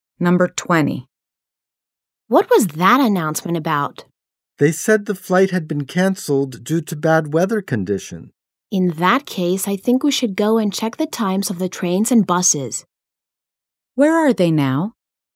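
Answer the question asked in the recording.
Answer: At an airport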